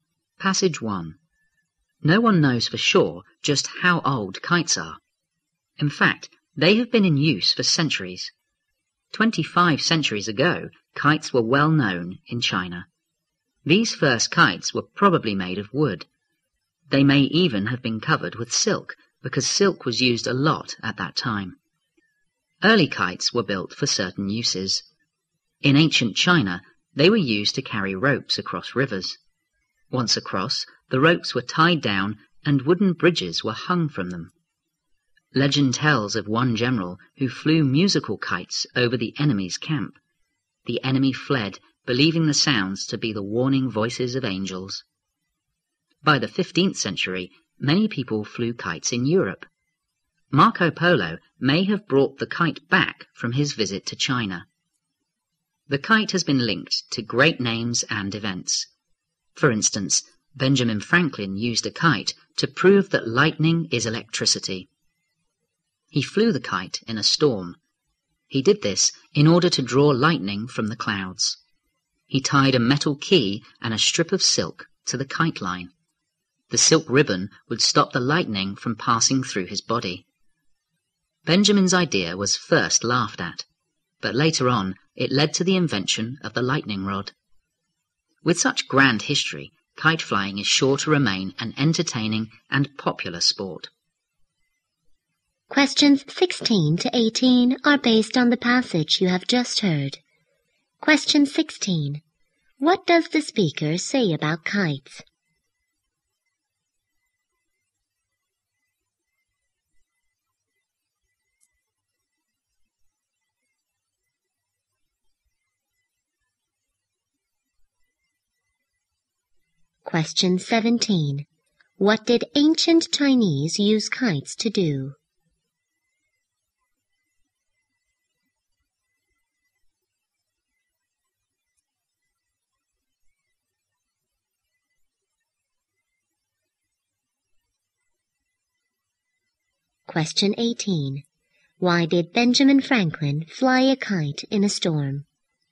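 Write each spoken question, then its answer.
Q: What does the speaker say about kites?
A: They have been used for centuries; no one knows exactly how old they are.

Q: What did ancient Chinese use kites to do?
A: To carry ropes across rivers.

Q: Why did Benjamin Franklin fly a kite in a storm?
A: To draw lightning from the clouds and prove lightning is electricity.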